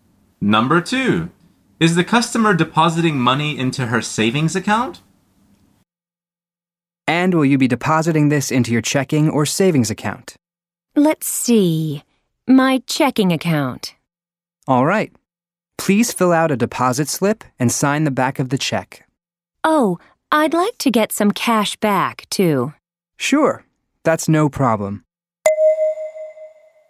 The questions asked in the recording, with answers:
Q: is the customer depositing money into her savings account?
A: The answer is no. She wants to put it into her checking account.